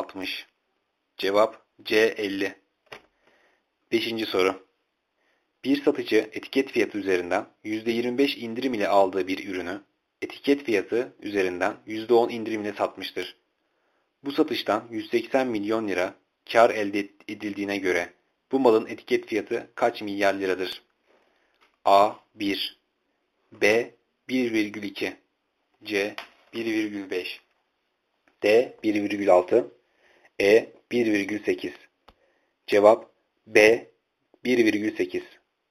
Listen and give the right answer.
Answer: Cevap B. 1,8.